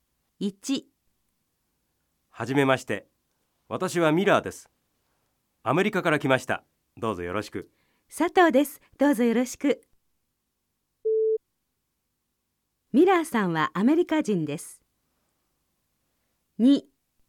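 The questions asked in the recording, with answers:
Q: ミラーさんはアメリカ人です。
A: ○ (正しい)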